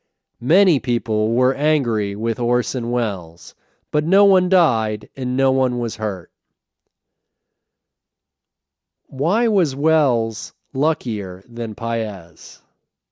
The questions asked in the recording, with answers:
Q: Why was Welles luckier than Paez?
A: Welles was luckier than Paez because no one died and no one was hurt.